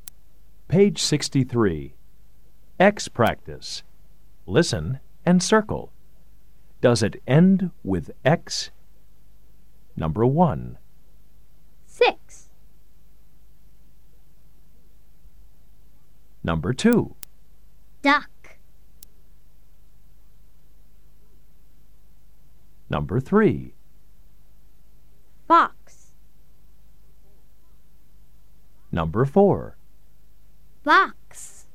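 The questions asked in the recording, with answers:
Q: Does it end with X?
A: Yes (six)

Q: Does it end with X?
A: No (duck)

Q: Does it end with X?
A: Yes (fox)

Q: Does it end with X?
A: Yes (box)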